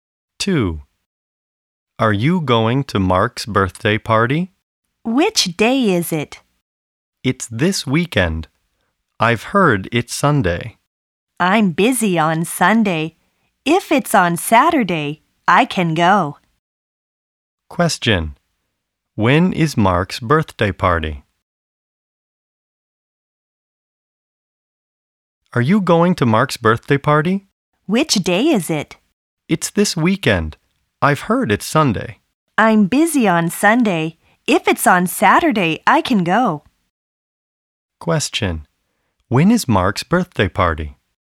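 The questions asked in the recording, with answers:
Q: When is Mark's birthday party?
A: On Sunday (this weekend)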